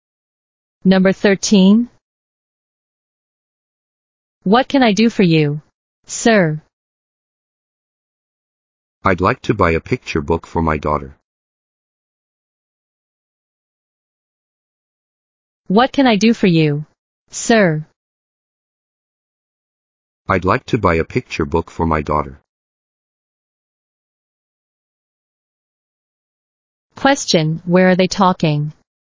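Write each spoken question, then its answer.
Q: Question, where are they talking?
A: In a bookstore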